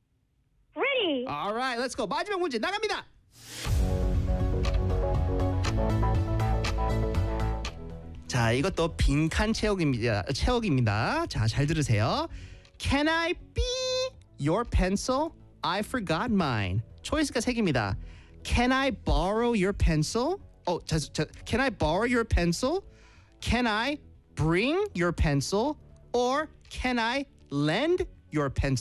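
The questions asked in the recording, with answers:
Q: Can I be your pencil? I forgot mine.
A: A: Can I borrow your pencil?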